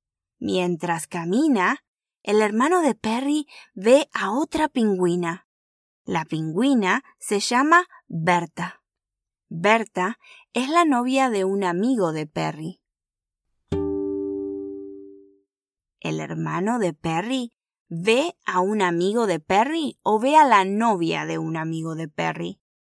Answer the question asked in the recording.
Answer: Exacto. El hermano de Perry ve a la novia de un amigo de Perry.